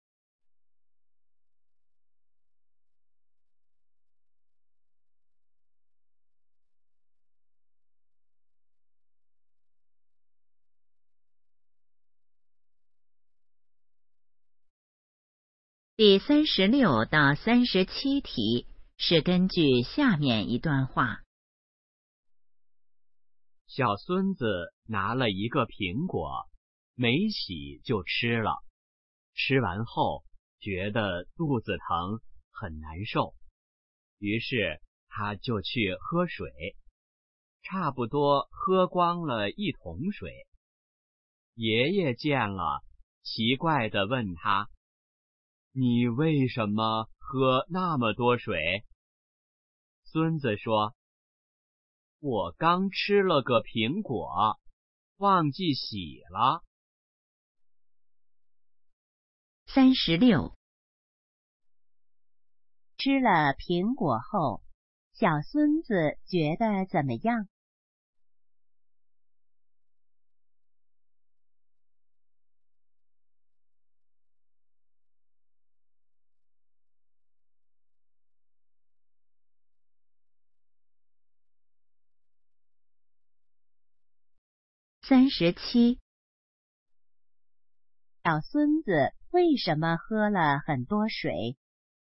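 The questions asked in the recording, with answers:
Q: 吃了苹果后,小孙子觉得怎么样?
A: 肚子疼,很难受

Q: 小孙子为什么喝了很多水?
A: 吃苹果忘记洗了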